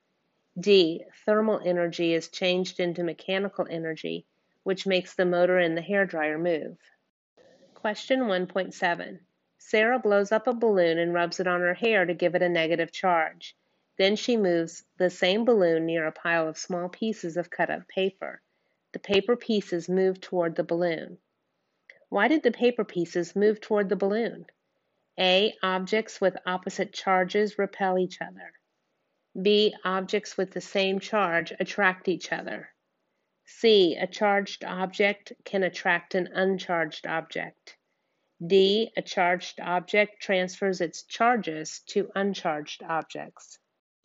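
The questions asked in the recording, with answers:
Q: Why did the paper pieces move toward the balloon?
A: C: A charged object can attract an uncharged object.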